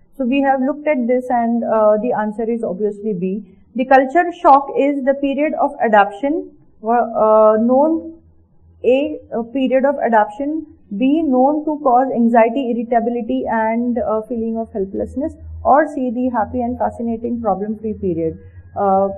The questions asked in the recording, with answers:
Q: The culture shock is the period of adaption, known A, period of adaption, B, known to cause anxiety, irritability, and feeling of helplessness, or C, the happy and fascinating problem-free period.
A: We have seen what cultural shock it takes you really through a lot of anxiety and irritability.